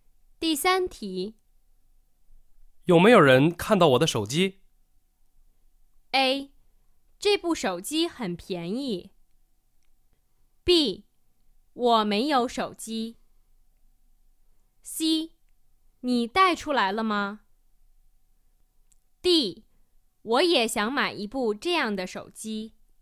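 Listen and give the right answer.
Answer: C: 你带出来了吗?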